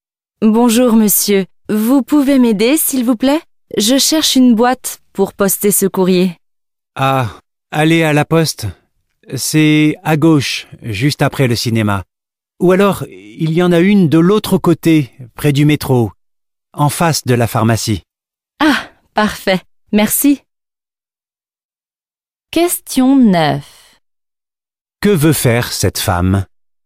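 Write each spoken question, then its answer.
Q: Que veut faire cette femme ?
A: Poster un courrier (une lettre)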